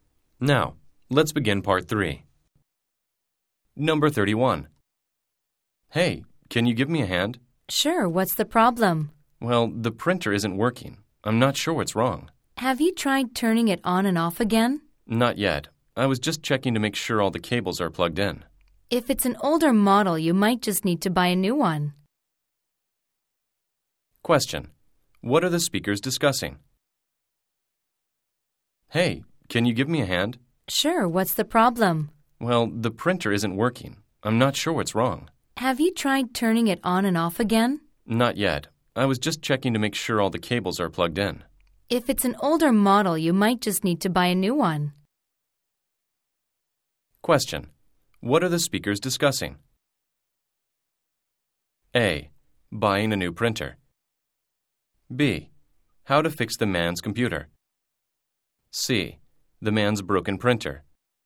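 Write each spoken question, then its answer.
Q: What are the speakers discussing?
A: C: The man's broken printer.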